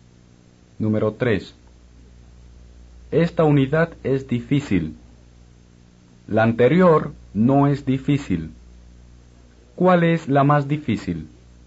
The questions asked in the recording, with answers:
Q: ¿Cuál es la más difícil?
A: Esta unidad, o esta, es la más difícil.